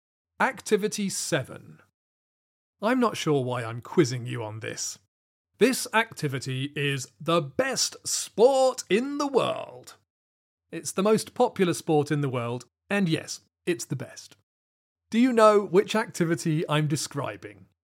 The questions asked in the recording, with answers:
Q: Do you know which activity I'm describing?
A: It's football, of course.